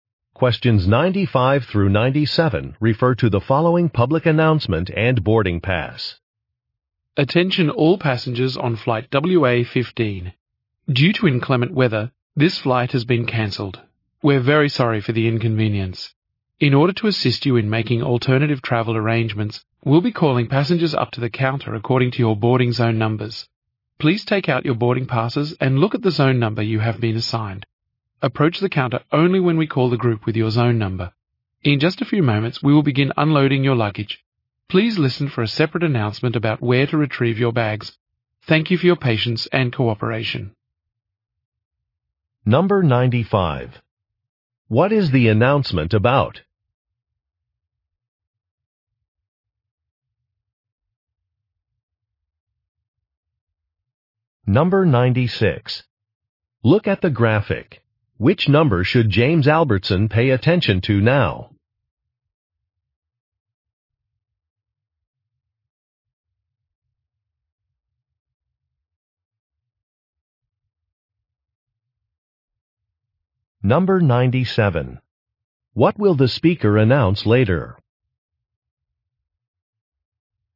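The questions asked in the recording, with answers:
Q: What is the announcement about?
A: A flight cancellation

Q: What will the speaker announce later?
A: Where to get their luggage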